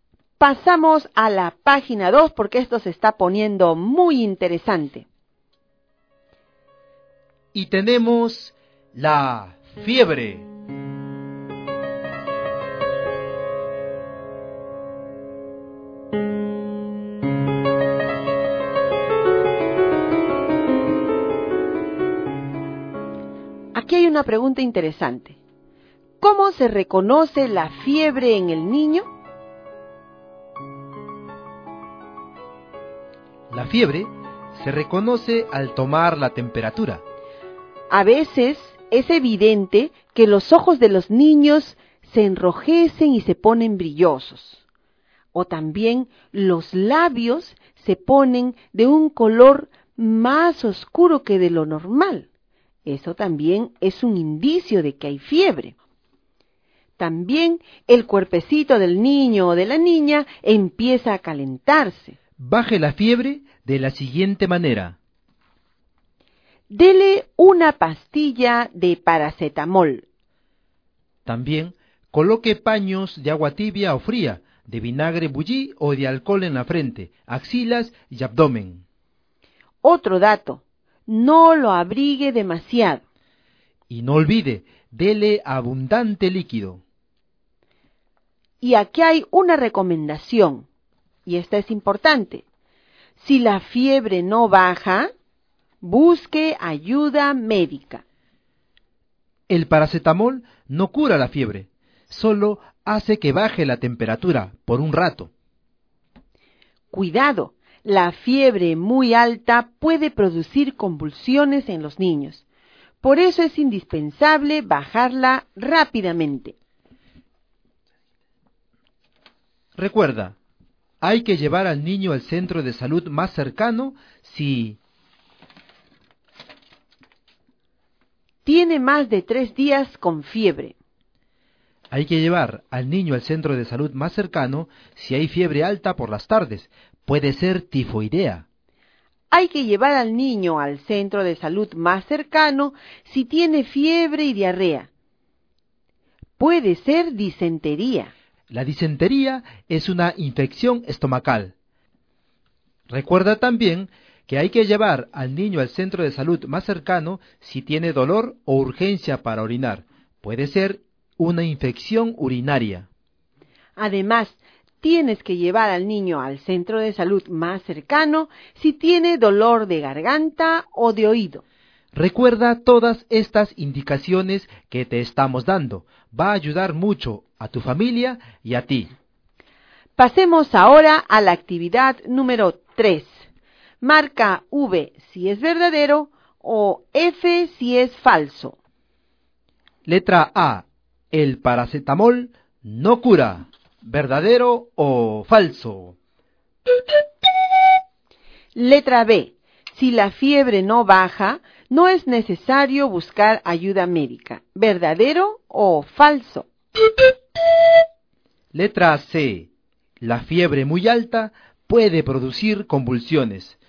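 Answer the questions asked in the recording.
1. Verdadero
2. Falso
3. Verdadero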